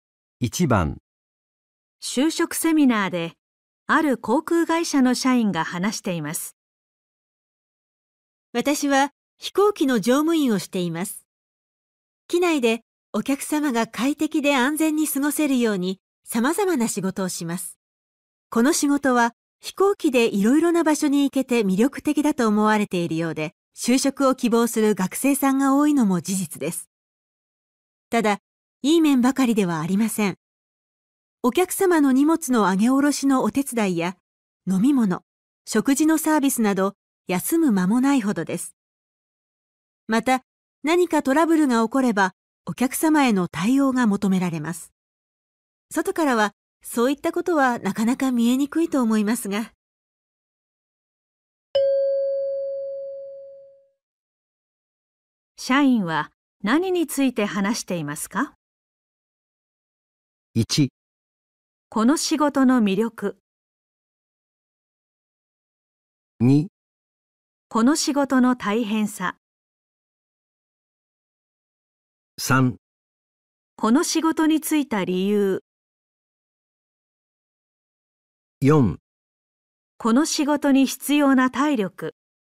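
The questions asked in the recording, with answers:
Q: 社員は何について話していますか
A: 2: この仕事の大変さ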